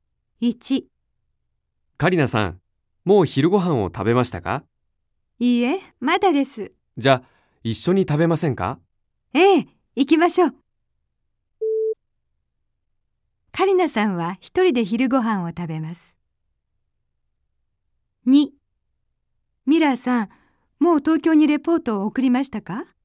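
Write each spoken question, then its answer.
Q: カリナさんは一人で昼ご飯を食べます。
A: ×(一緒に食べます)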